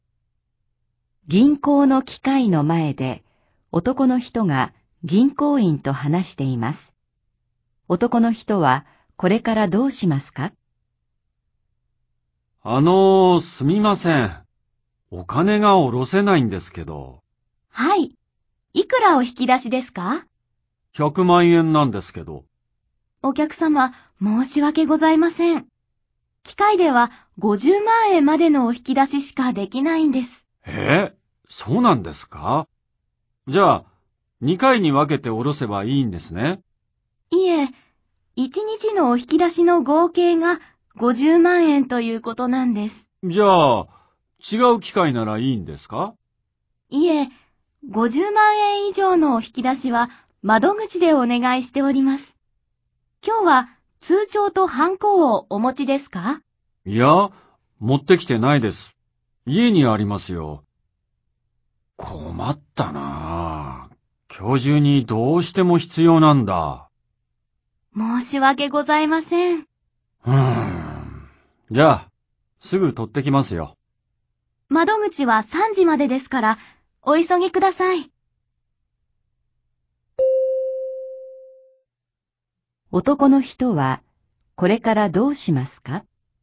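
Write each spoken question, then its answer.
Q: 男の人は、これからどうしますか?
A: 家に通帳とハンコを取りに帰る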